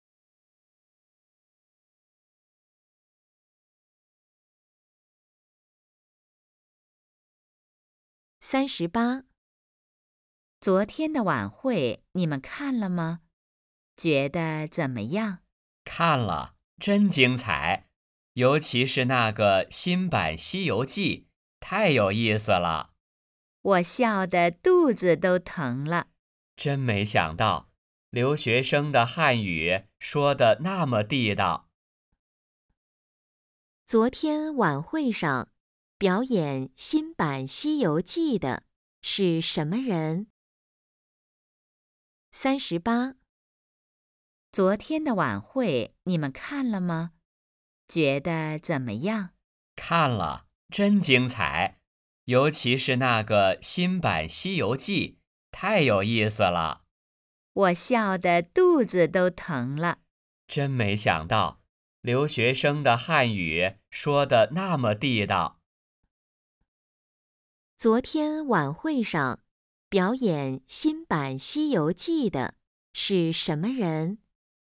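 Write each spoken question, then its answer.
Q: 昨天晚会上表演新版《西游记》的是什么人?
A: 留学生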